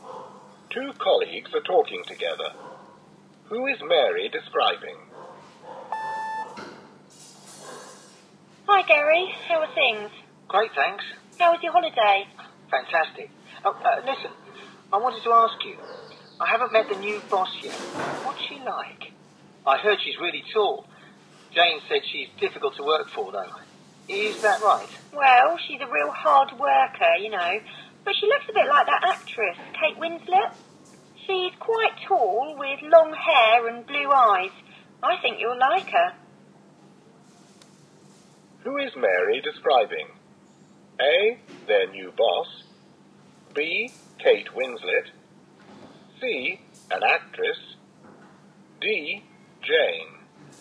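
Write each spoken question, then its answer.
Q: Who is Mary describing?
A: A: their new boss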